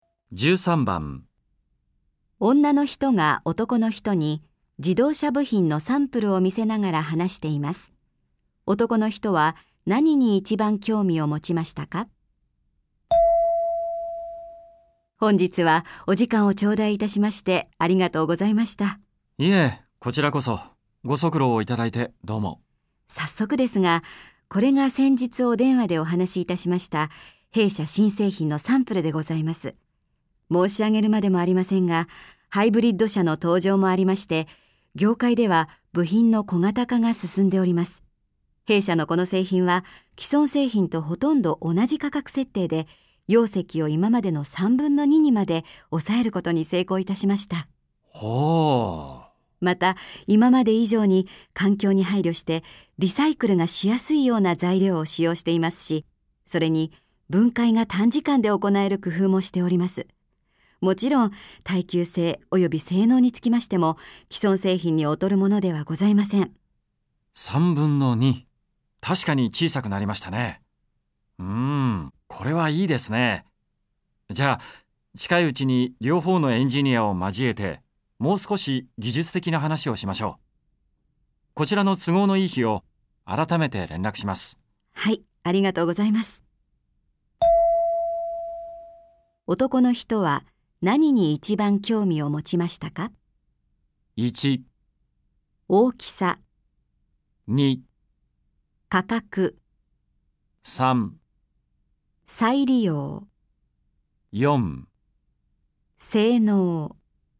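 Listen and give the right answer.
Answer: 1: 大きさ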